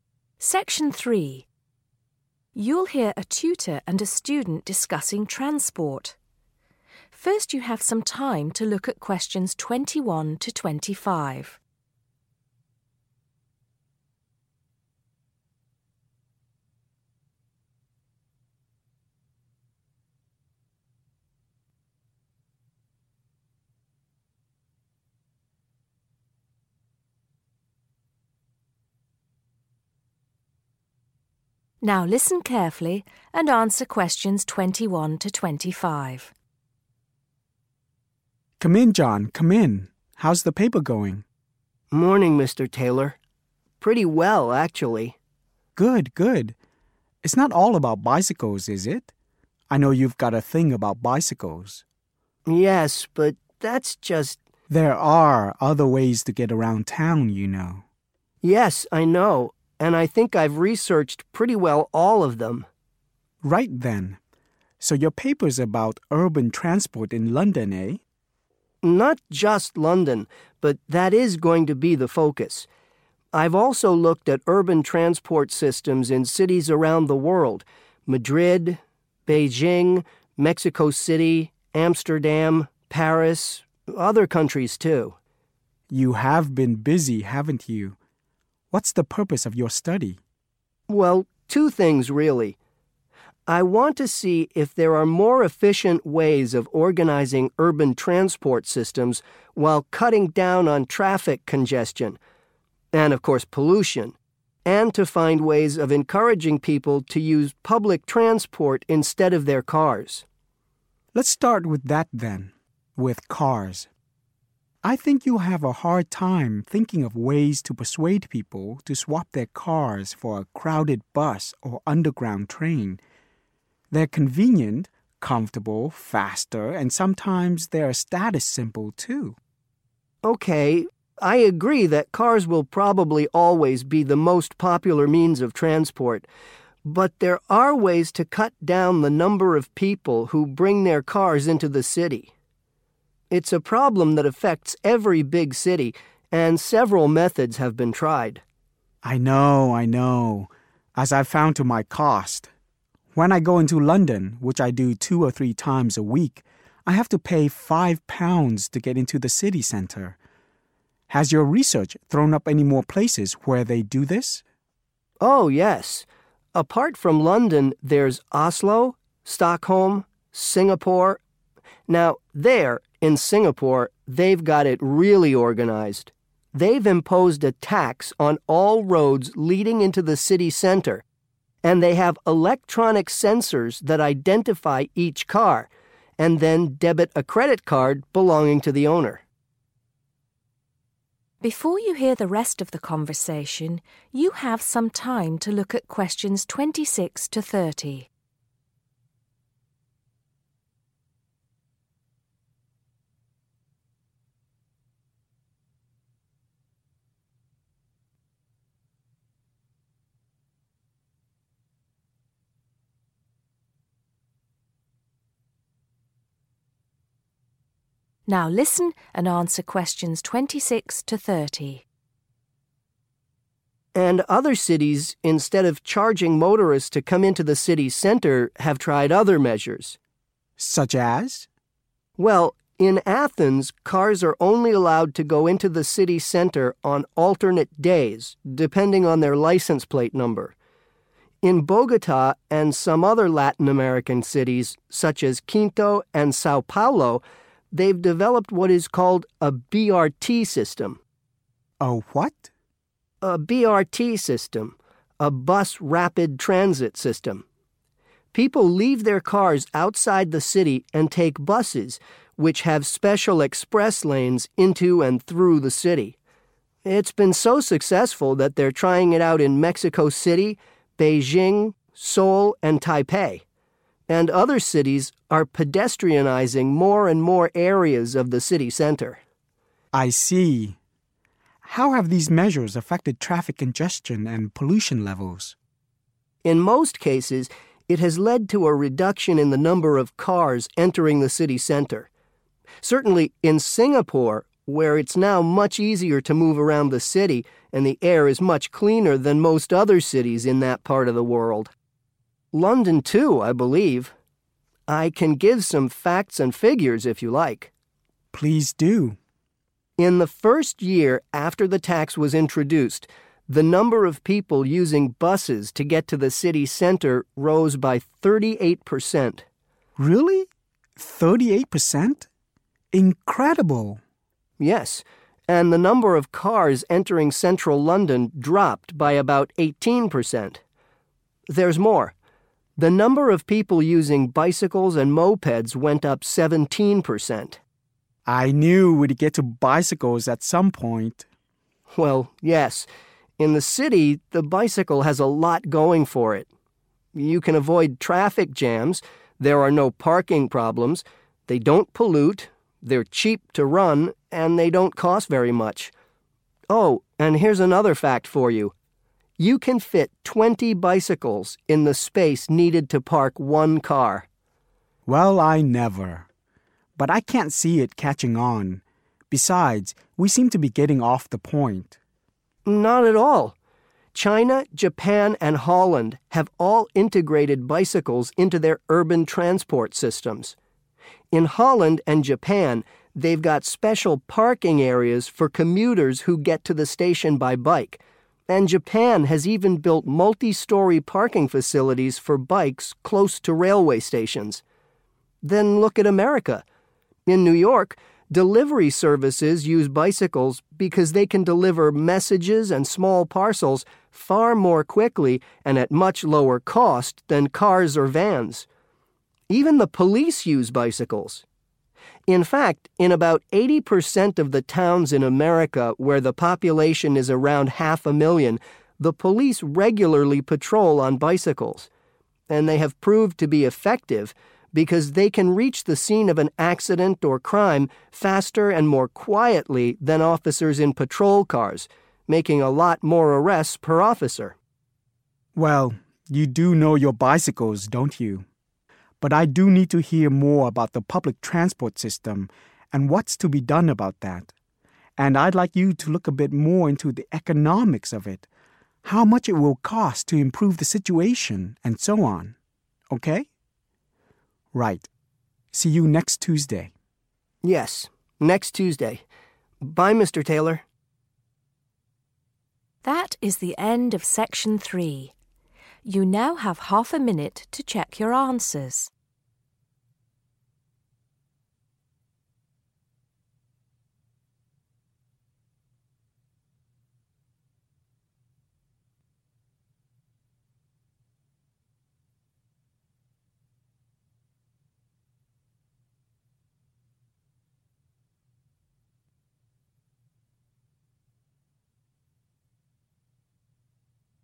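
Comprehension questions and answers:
Answer the questions below. Write NO MORE THAN THREE WORDS AND/OR A NUMBER for each answer.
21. What is John researching?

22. Apart from pollution, what would John like to see reduced?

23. According to John's tutor, what can cars sometimes act as?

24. How much does John's tutor pay to drive into London?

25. In Singapore, what do car owners use to pay their road tax?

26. In Athens, cars can only enter the city center on................ .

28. In London, after a new road tax was introduced, moped and bicycle use increased by...................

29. Both Japan and Holland provide.................... for those cycling to train stations.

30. In the USA, police officers on bikes make more................. than those in patrol cars.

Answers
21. urban transport
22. traffic congestion
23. a status symbol
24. £5
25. a credit card
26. alternate days
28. 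17%
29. parking areas
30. arrests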